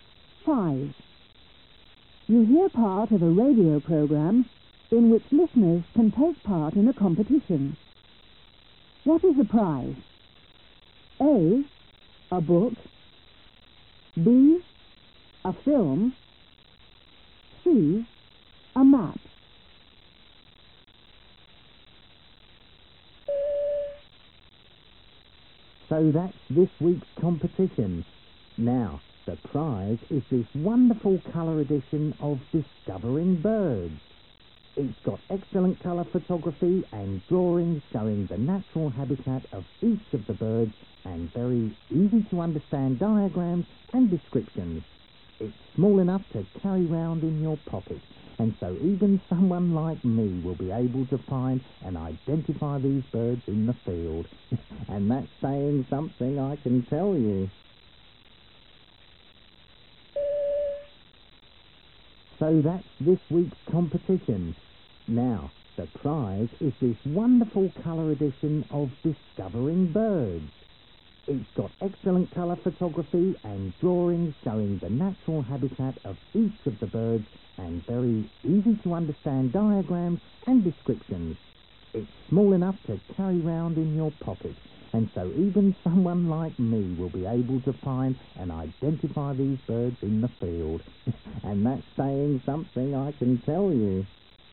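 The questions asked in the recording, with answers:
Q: What is the prize?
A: A: A book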